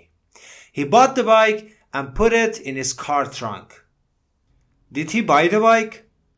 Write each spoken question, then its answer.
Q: Did he buy the bike?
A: Yes, he bought it. Jimmy bought the bike.